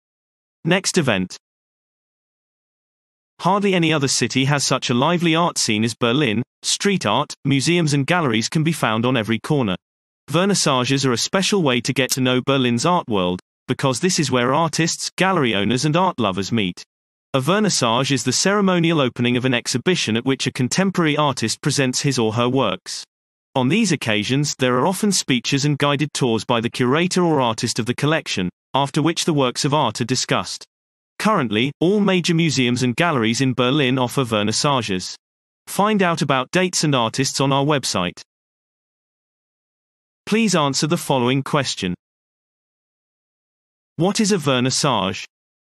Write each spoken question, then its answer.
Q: What is a vernissage?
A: A vernissage is the formal opening of an exhibition at which a contemporary artist presents his or her work.